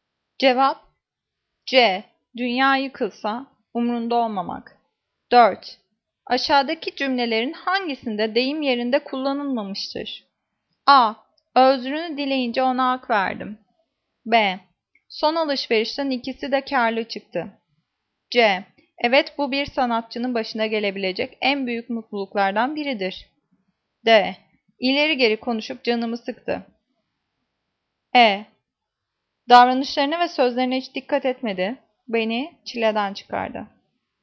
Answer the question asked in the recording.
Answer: Cevap C. Evet, bu bir sanatçının başına gelebilecek en büyük mutluluklardan biridir.